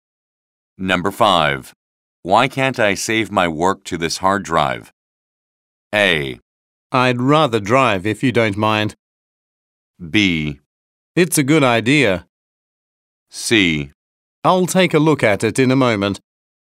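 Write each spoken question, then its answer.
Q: Why can't I save my work to this hard drive?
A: C: I'll take a look at it in a moment.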